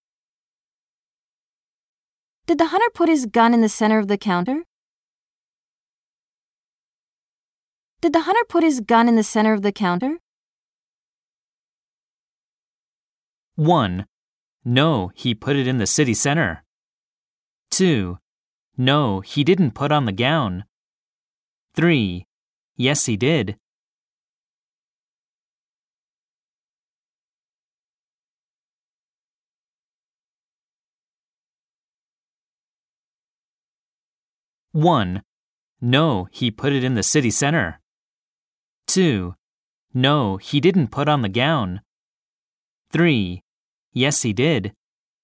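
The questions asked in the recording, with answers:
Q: Did the hunter put his gun in the center of the counter?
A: 3: Yes, he did.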